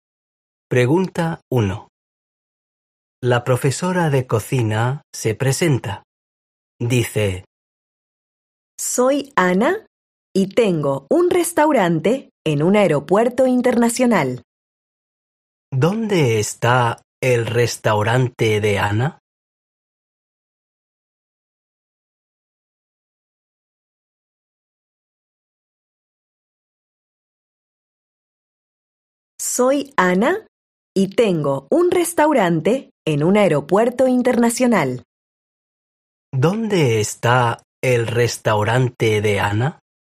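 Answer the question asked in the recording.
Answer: En un aeropuerto internacional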